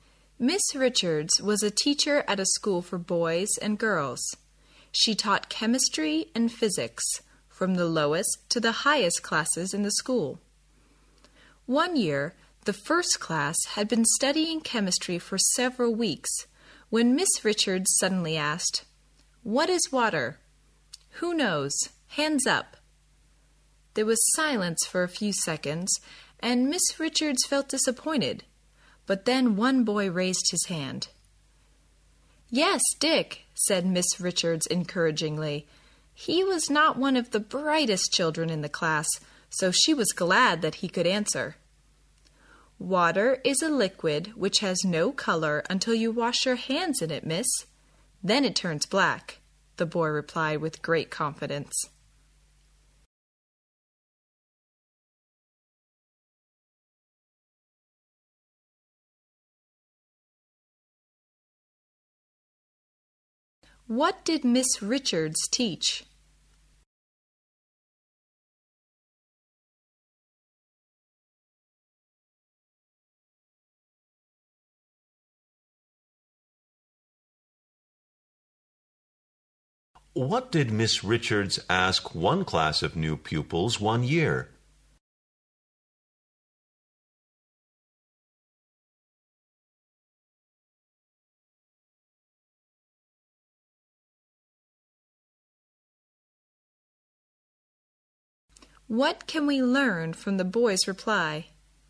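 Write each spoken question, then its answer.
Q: What did Miss Richards teach?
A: Chemistry and physics

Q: What did Miss Richards ask one class of new pupils one year?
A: What is water?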